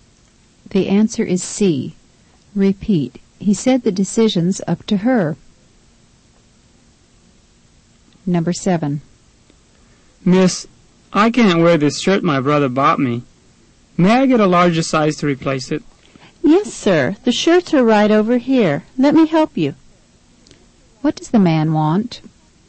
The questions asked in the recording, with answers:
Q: What does the man want?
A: He wants a larger shirt in exchange for the small one.